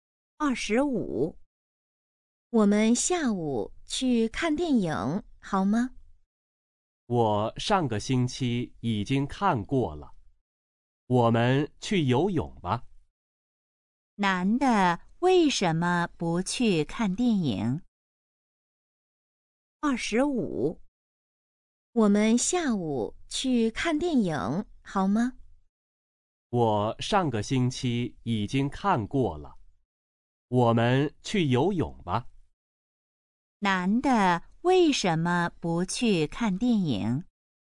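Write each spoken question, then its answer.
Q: 男的为什么不去看电影?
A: 他上个星期已经看过了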